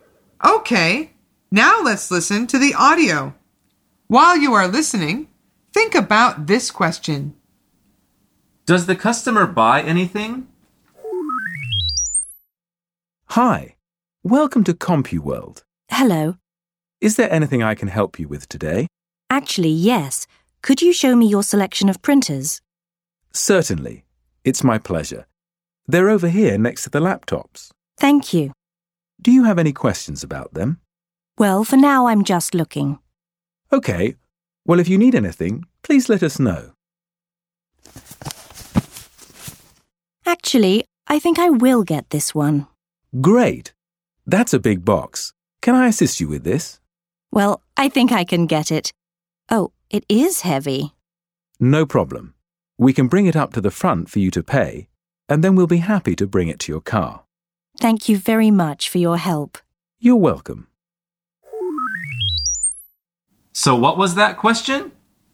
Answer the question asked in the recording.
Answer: The answer is yes, she does.